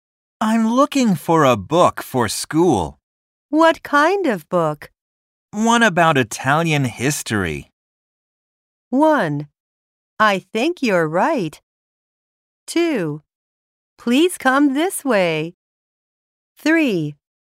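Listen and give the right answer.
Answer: 2: Please come this way.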